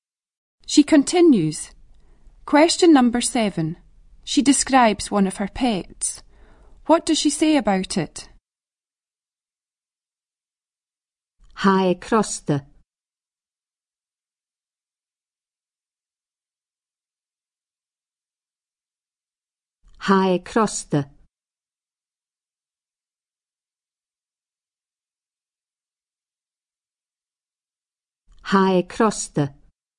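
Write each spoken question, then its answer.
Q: What does she say about it?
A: It is naughty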